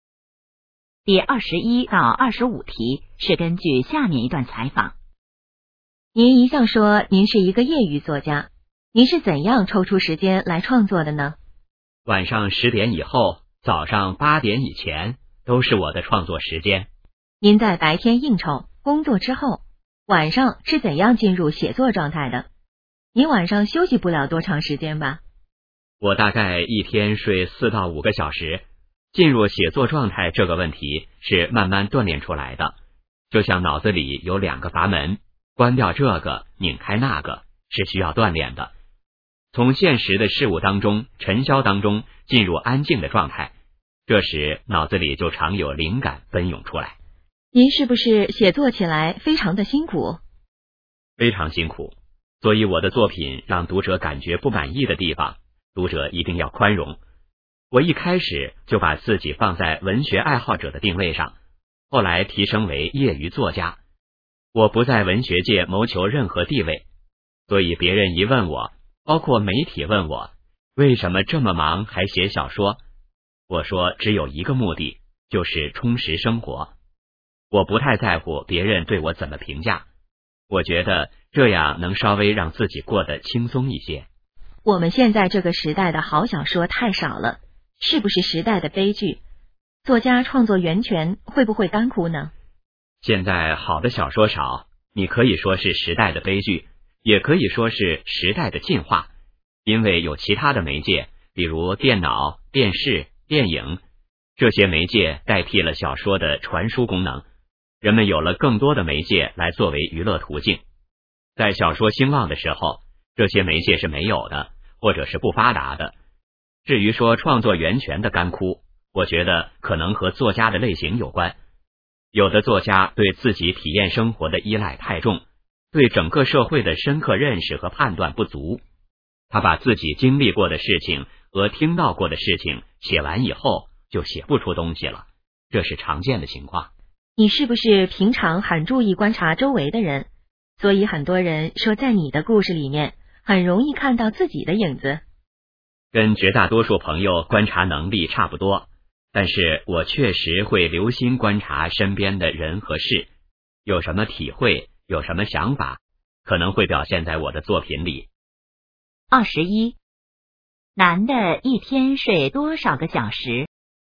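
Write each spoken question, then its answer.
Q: 男的一天睡多少个小时?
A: 4到5个小时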